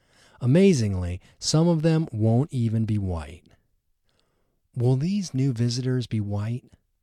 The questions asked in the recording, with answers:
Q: Will these new visitors be white?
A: No, they won't all be white.